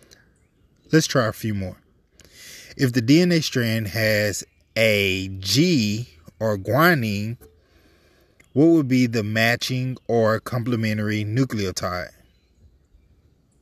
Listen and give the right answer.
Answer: If you chose cytosine, you're absolutely correct.